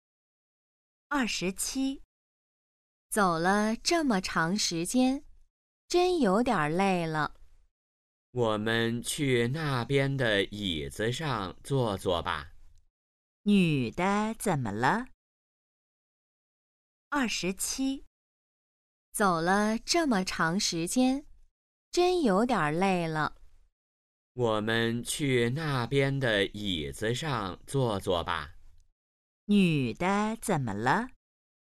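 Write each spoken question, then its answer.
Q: 女的怎么了?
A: 累了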